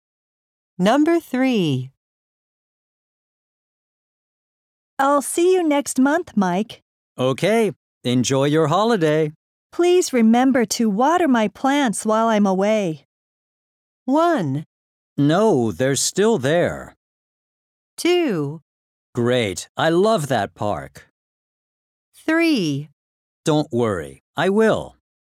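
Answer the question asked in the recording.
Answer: 3: Don't worry, I will.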